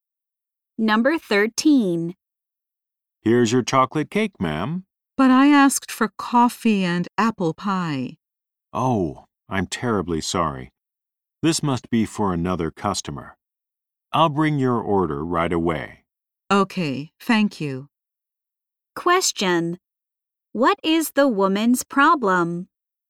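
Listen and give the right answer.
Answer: She was brought the wrong order.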